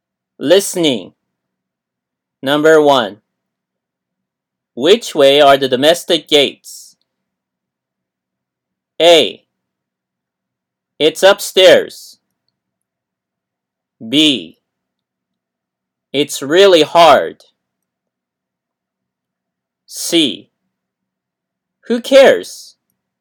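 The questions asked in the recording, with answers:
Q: Which way are the domestic gates?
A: A: It's upstairs.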